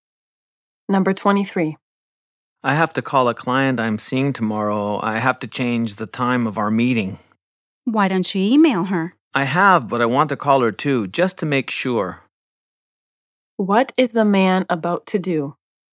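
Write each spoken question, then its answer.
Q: What is the man about to do?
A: Call a client to change a meeting time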